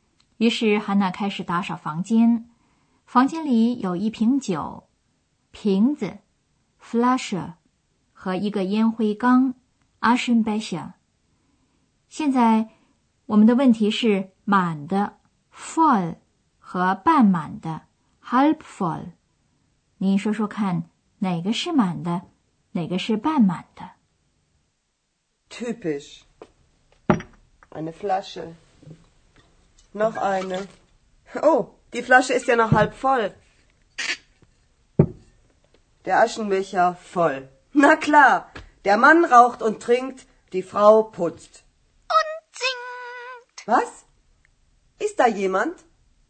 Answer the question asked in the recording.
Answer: 烟灰缸是满的,酒瓶子是半满的